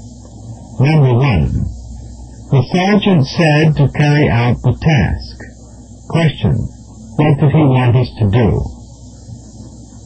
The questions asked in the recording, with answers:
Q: what did he want us to do?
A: The correct answer is B, accomplish the job.